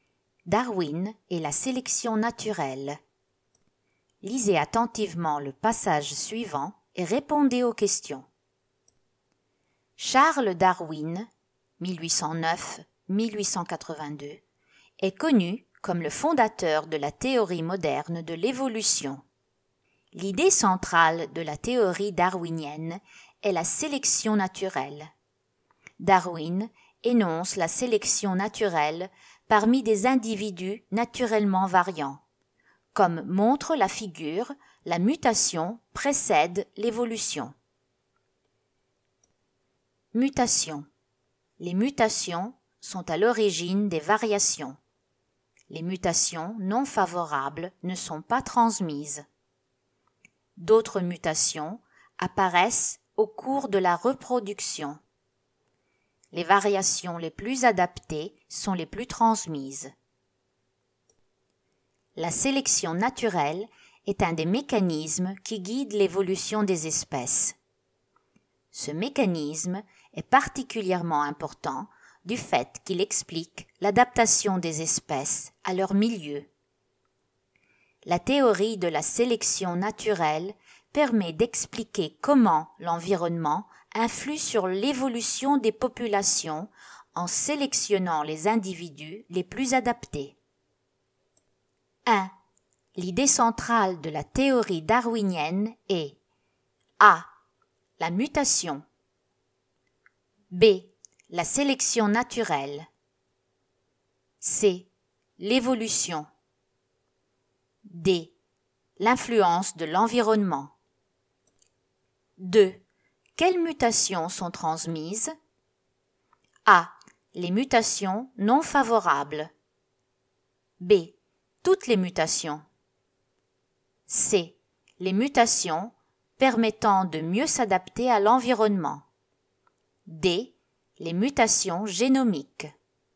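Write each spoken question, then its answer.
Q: L'idée centrale de la théorie darwinienne est A.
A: B: La sélection naturelle

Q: Quelles mutations sont transmises?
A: C: Les mutations permettant de mieux s'adapter à l'environnement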